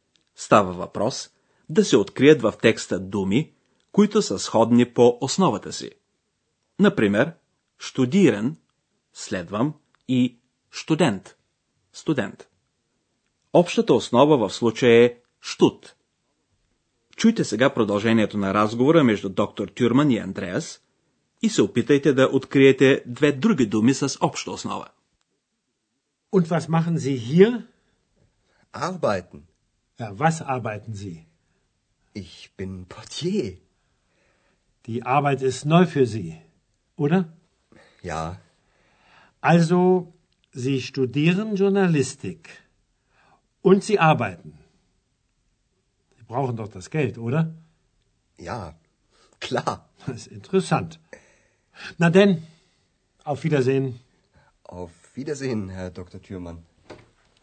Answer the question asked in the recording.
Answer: Двете други думи с обща основа са arbeiten, работя и arbeit, работа.